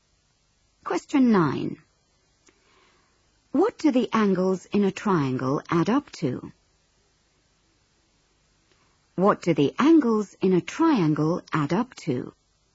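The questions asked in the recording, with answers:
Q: What do the angles in a triangle add up to?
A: 180 degrees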